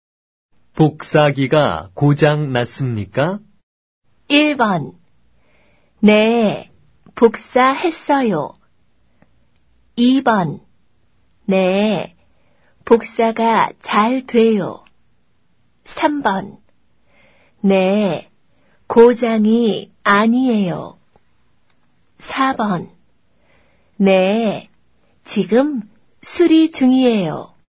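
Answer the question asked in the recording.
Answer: 4: 네, 지금 수리 중이에요.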